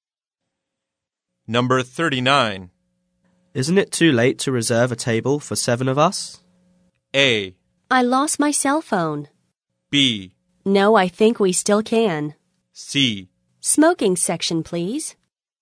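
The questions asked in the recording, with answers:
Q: Isn't it too late to reserve a table for 7 of us?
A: B: No, I think we still can.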